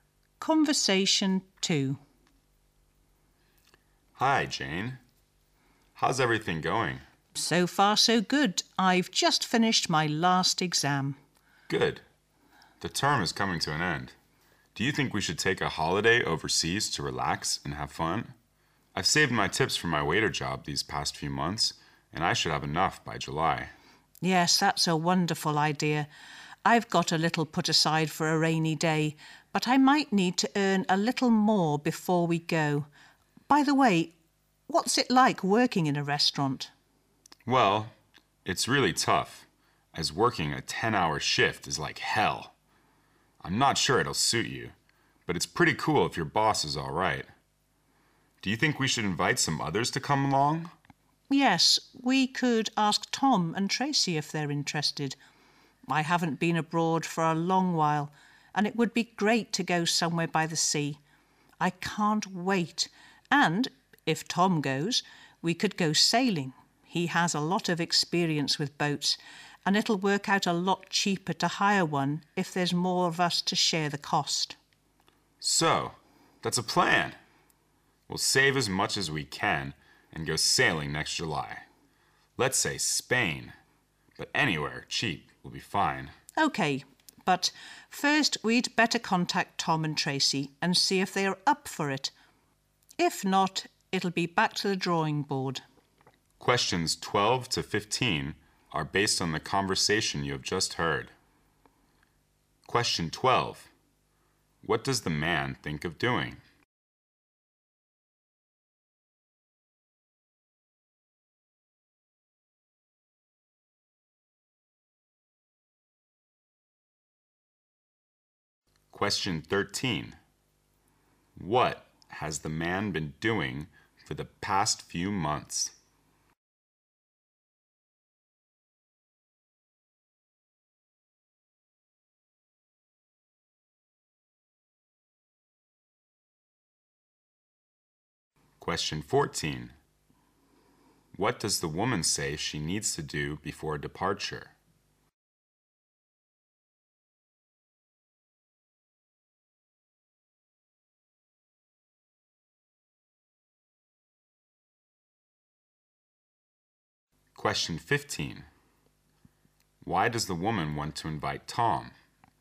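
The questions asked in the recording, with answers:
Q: What does the man think of doing?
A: Taking a holiday overseas

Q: What has the man been doing for the past few months?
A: Working as a waiter and saving his tips

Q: What does the woman say she needs to do before departure?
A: Earn a little more money

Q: Why does the woman want to invite Tom?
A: He has a lot of experience with boats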